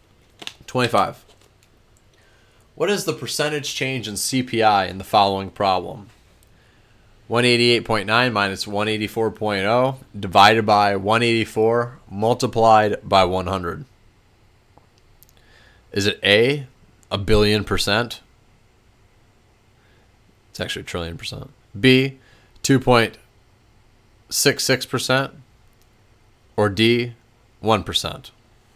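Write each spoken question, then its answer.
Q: What is the percentage change in CPI in the following problem?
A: B: 2.66%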